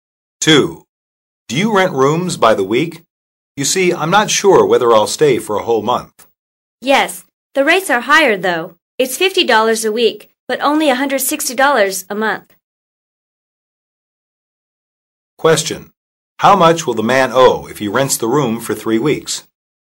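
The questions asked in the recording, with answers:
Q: How much will the man owe if he rents the room for 3 weeks?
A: $150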